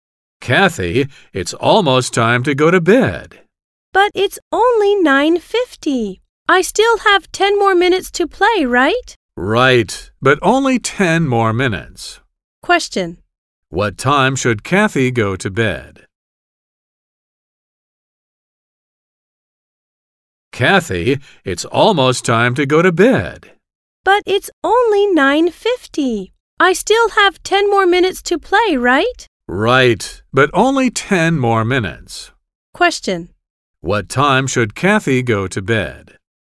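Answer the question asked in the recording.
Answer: At 10:00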